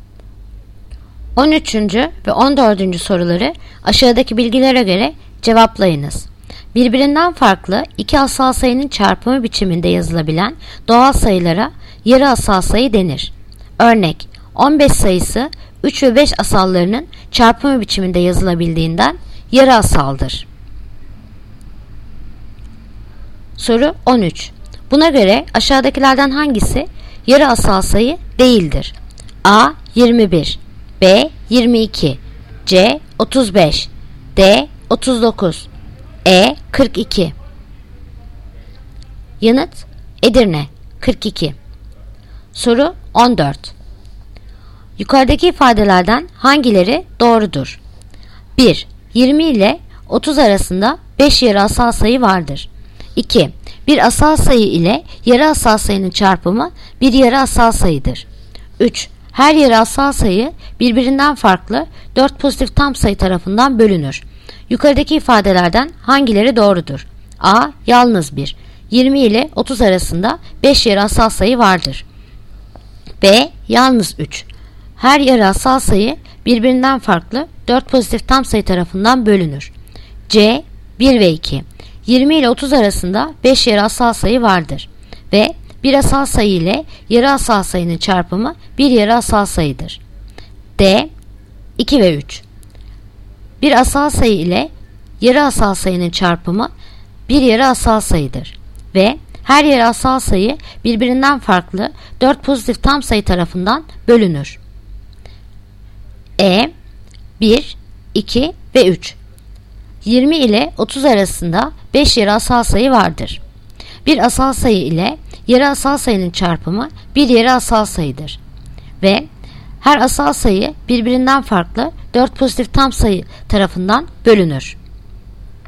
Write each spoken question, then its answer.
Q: Yukarıdaki ifadelerden hangileri doğrudur?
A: Yanıt Bursa. Yalnız 3. Yalnız 3.